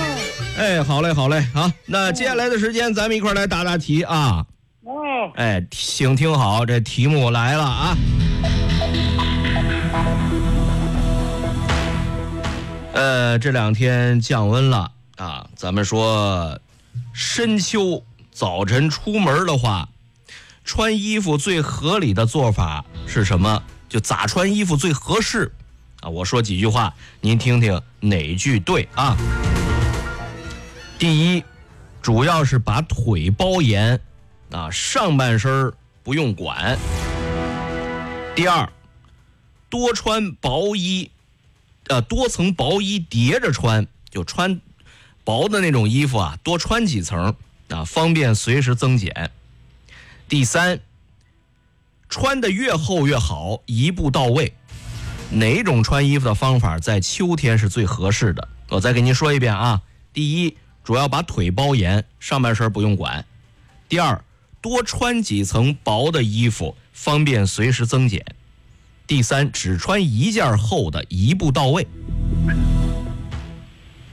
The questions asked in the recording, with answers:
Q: 哪种穿衣服的方法在秋天是最合适的?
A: 这个多层薄衣叠着穿,就多穿几层薄的呀,咱们随时增减啊,知道吧?